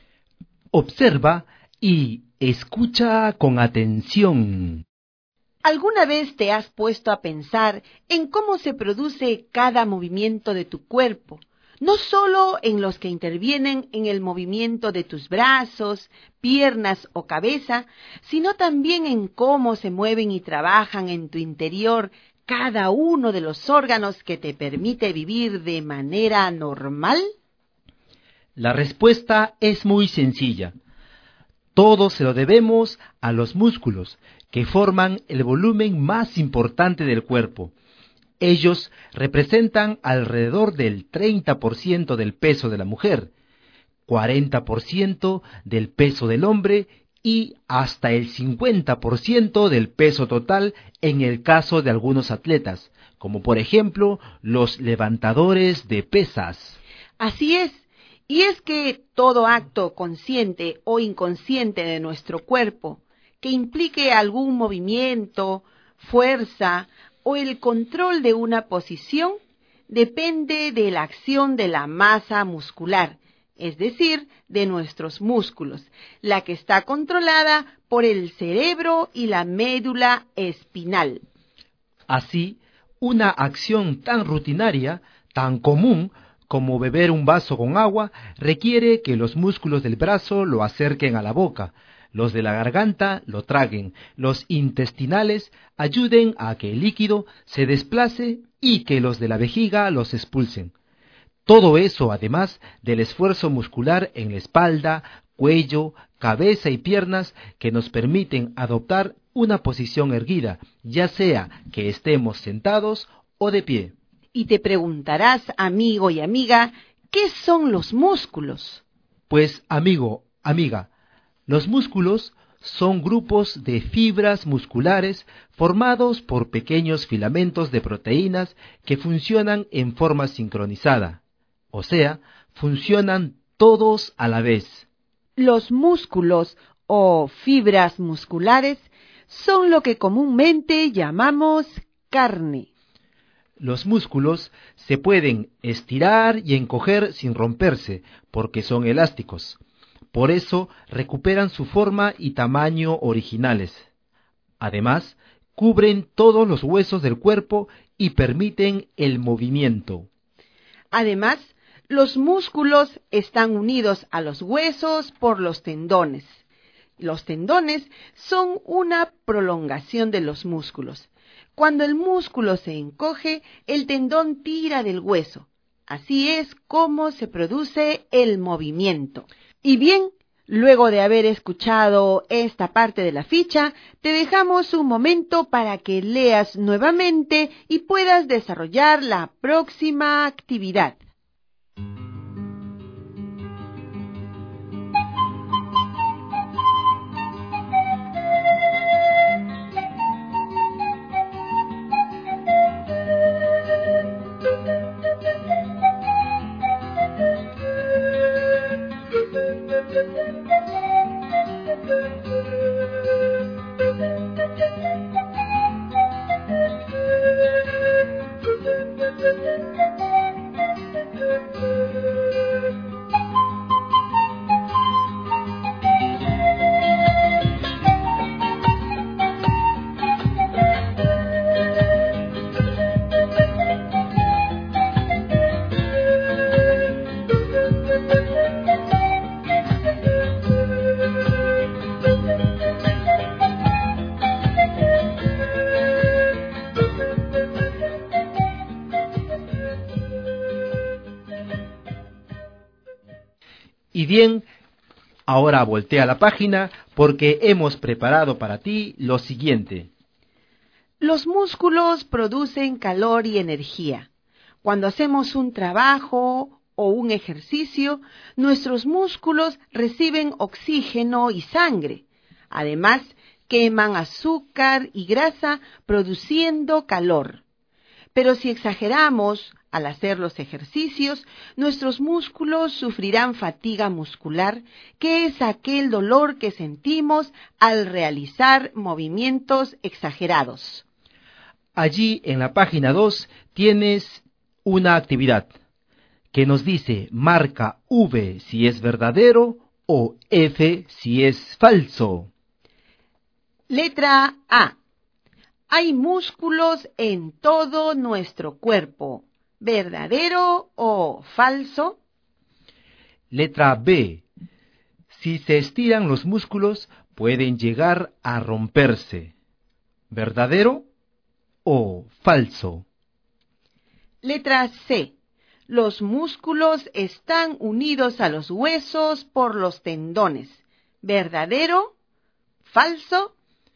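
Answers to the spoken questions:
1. Verdadero
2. Falso
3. Verdadero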